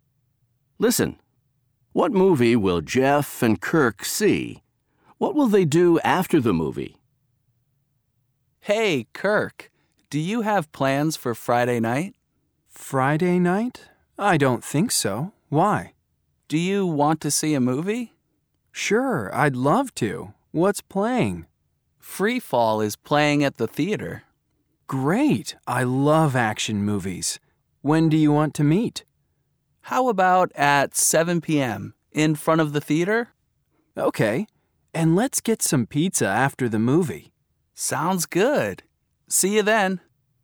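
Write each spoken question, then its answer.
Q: What movie will Jeff and Kirk see?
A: Free Fall

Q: What will they do after the movie?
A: Get some pizza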